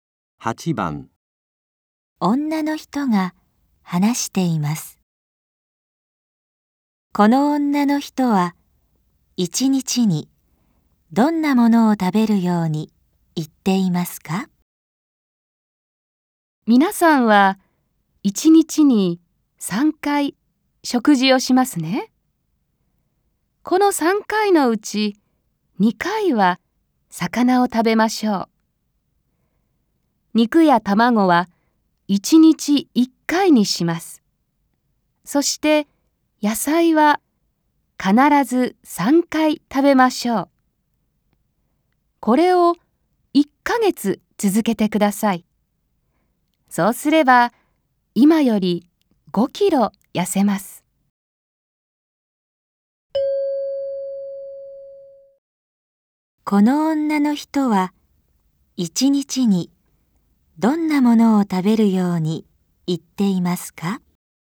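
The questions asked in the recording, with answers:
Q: この女の人は一日にどんなものを食べるように言っていますか?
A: 魚を2回、肉や卵を1回、野菜を3回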